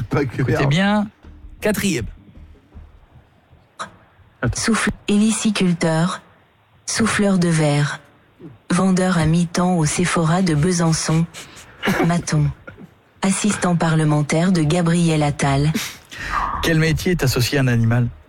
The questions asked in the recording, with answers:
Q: Quel métier est associé à un animal?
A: Hélicicultur.